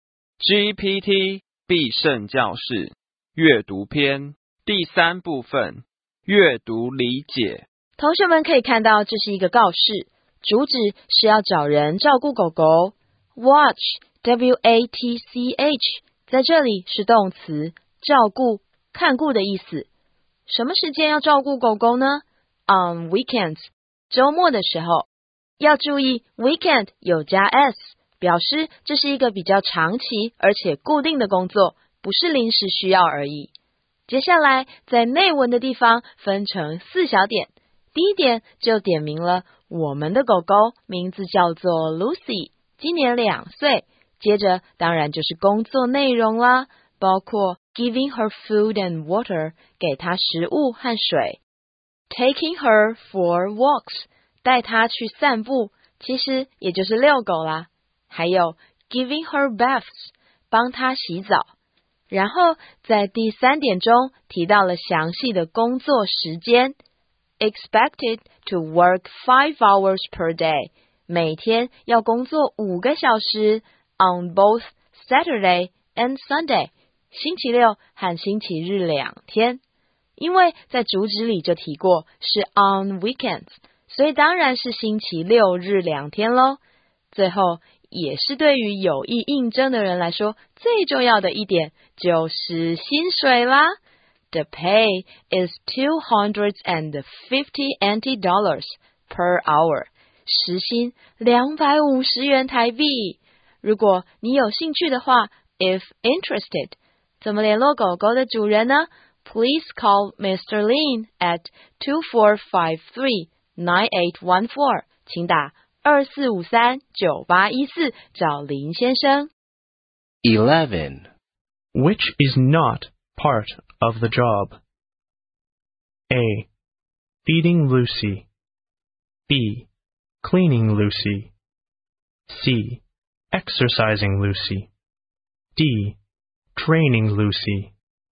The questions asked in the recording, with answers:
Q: Which is not part of the job?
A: 所以答案当然就要选 D, Training Lucy。